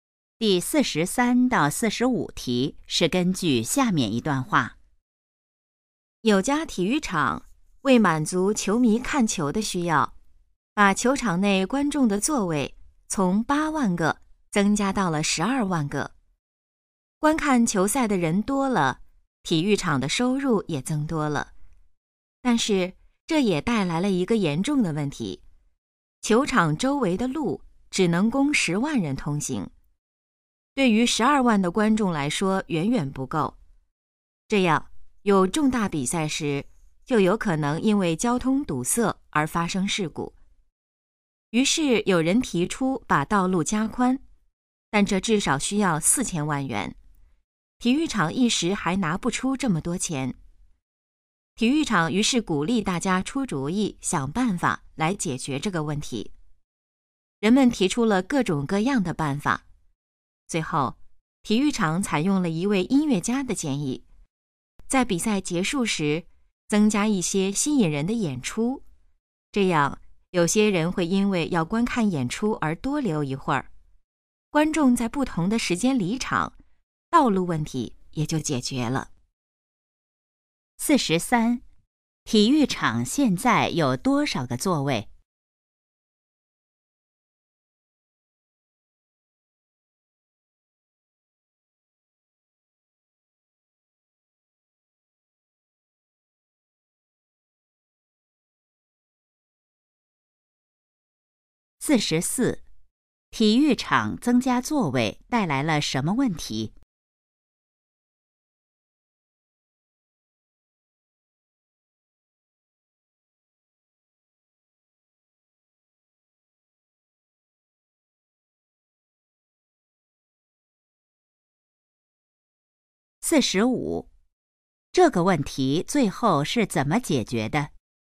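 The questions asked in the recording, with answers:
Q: 体育场现在有多少个座位?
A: 12万个

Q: 体育场增加座位带来了什么问题?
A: 交通问题,周围的路不够通行

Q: 这个问题最后是怎么解决的?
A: 比赛结束时增加演出,让观众在不同时间离场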